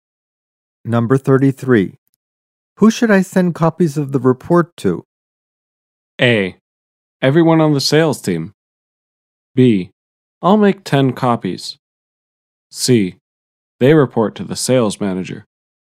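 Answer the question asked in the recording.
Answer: A: Everyone on the sales team.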